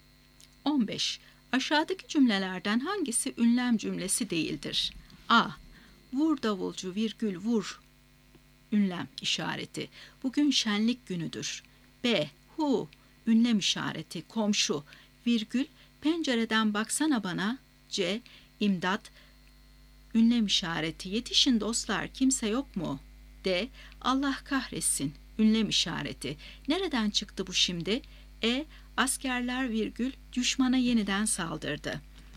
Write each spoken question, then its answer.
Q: Aşağıdaki cümlelerden hangisi ünlem cümlesi değildir?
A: Doğru cevap E şıkkı. Askerler virgül düşmana yeniden saldırdı.